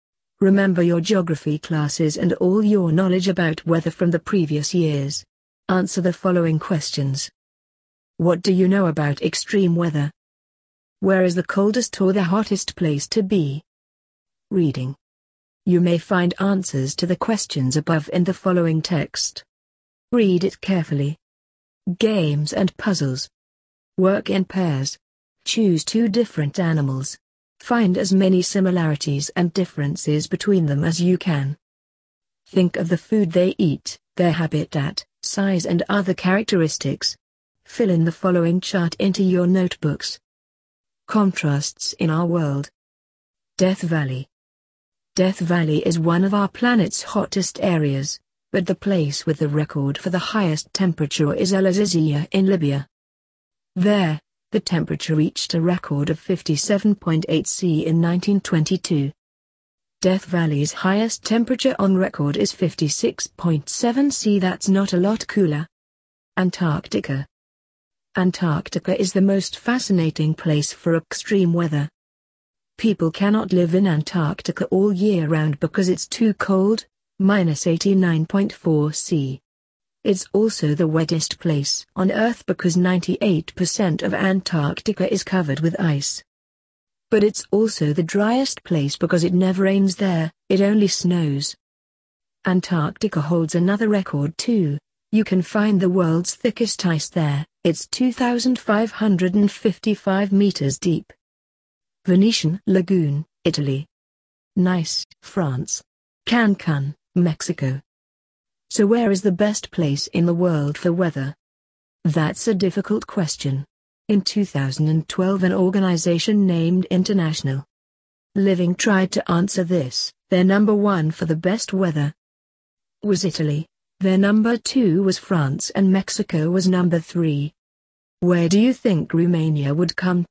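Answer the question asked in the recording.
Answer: Coldest: Antarctica; hottest: El Azizia in Libya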